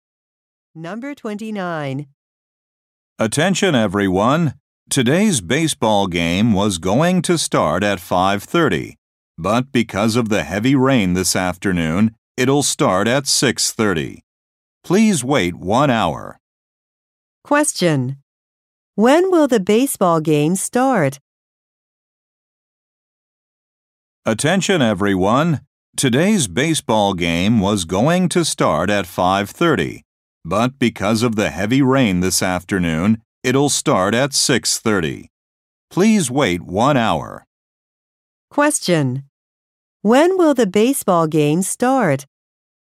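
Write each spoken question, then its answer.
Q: When will the baseball game start?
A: At 6:30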